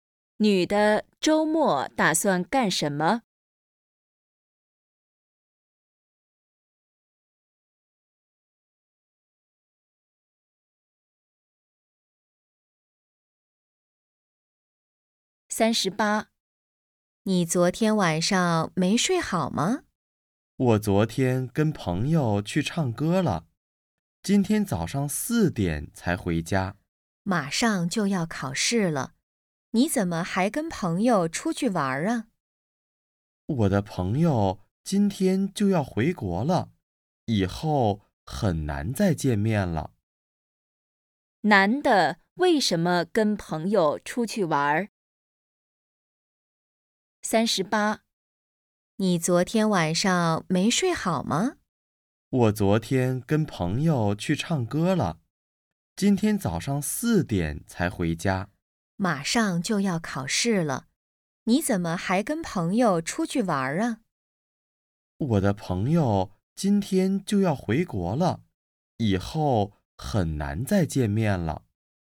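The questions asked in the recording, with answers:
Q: 男的为什么跟朋友出去玩?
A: 朋友要回国了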